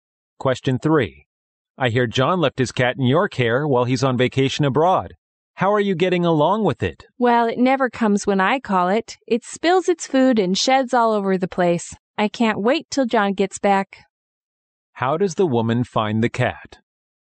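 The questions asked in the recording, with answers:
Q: How does the woman find the cat?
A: Troublesome and annoying to look after.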